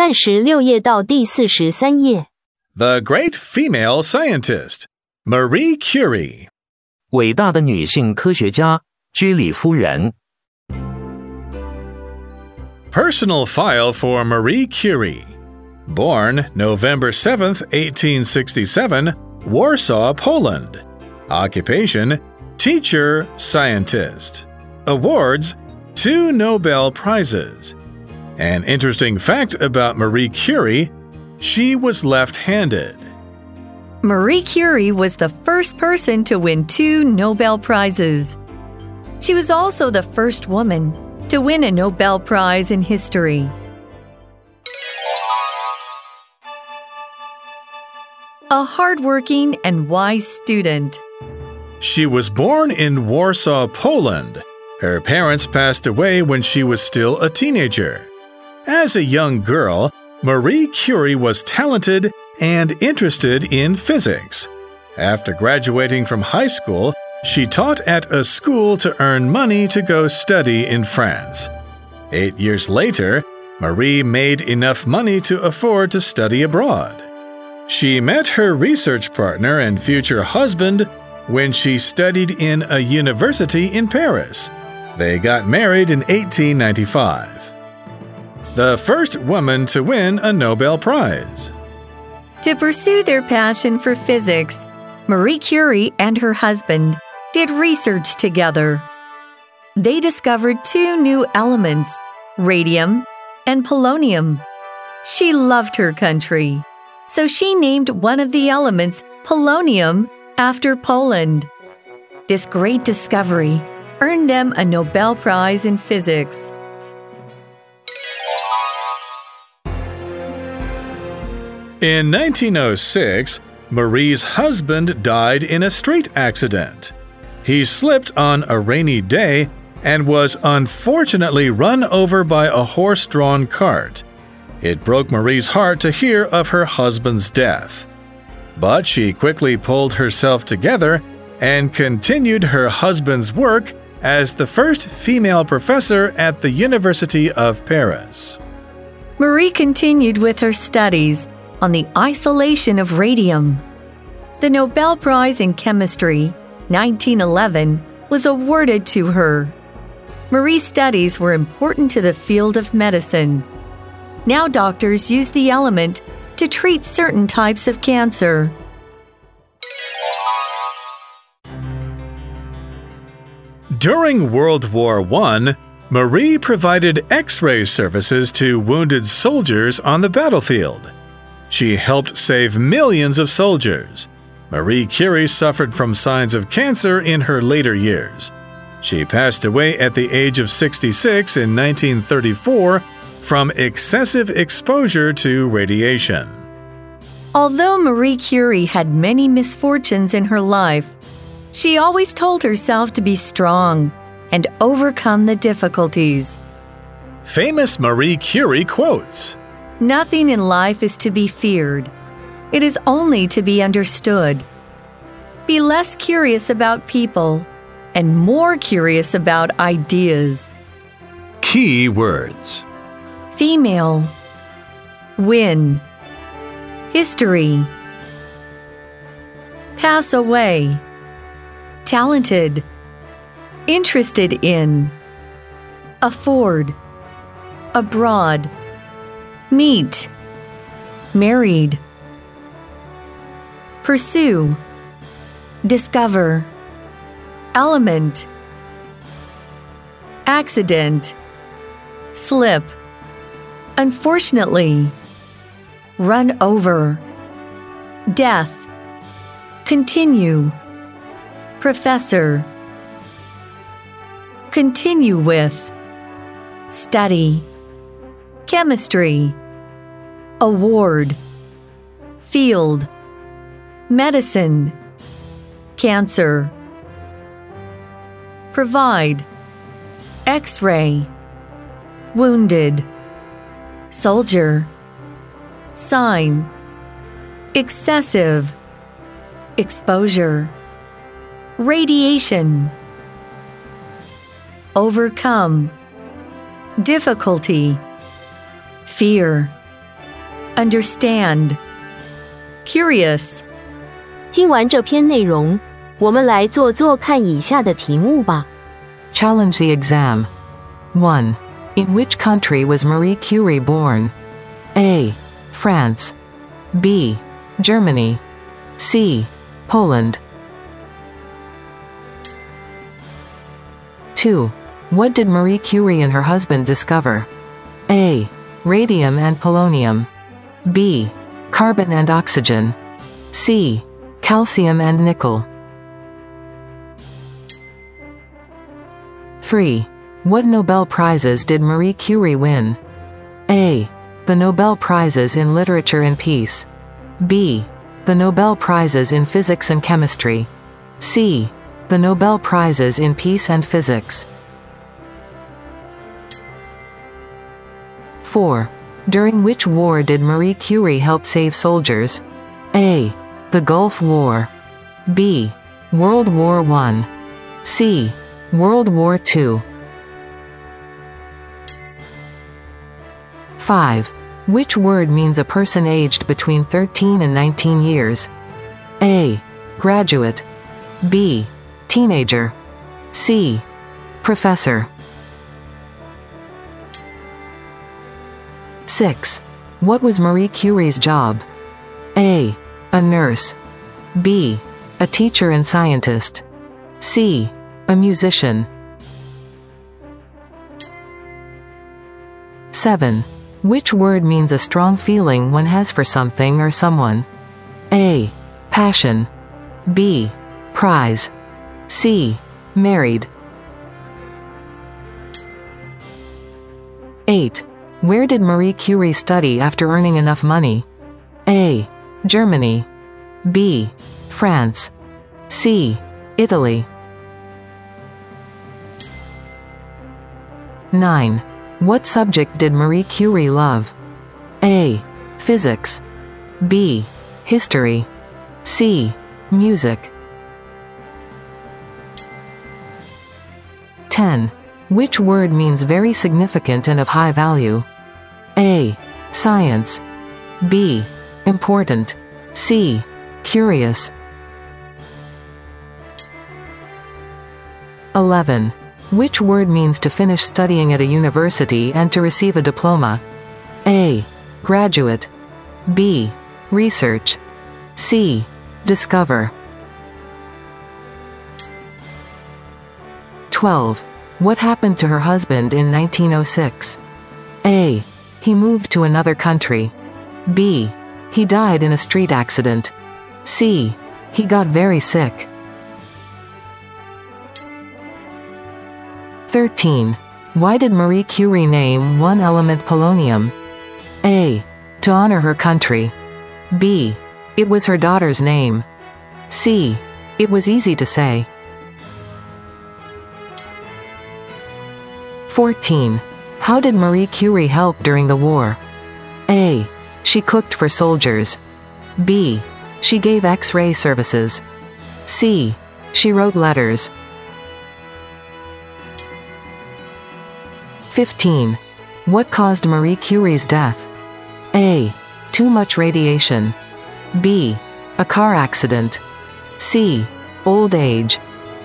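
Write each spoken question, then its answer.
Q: In which country was Marie Curie born?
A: C: Poland

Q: What did Marie Curie and her husband discover?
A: A: Radium and polonium

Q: What Nobel Prizes did Marie Curie win?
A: B: The Nobel Prizes in Physics and Chemistry

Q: During which war did Marie Curie help save soldiers?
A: B: World War I

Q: Which word means a person aged between 13 and 19 years?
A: B: Teenager

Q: What was Marie Curie's job?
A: B: A teacher and scientist

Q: Which word means a strong feeling one has for something or someone?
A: A: Passion

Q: Where did Marie Curie study after earning enough money?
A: B: France

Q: What subject did Marie Curie love?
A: A: Physics

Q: Which word means very significant and of high value?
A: B: Important

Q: Which word means to finish studying at a university and to receive a diploma?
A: A: Graduate

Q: What happened to her husband in 1906?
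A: B: He died in a street accident.

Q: Why did Marie Curie name one element polonium?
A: A: To honor her country.

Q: How did Marie Curie help during the war?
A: B: She gave X-ray services.

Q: What caused Marie Curie's death?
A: A: Too much radiation.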